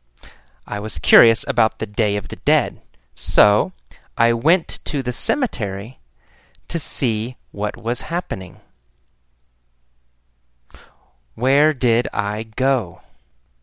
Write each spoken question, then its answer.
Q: Where did I go?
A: To the cemetery. I went to the cemetery.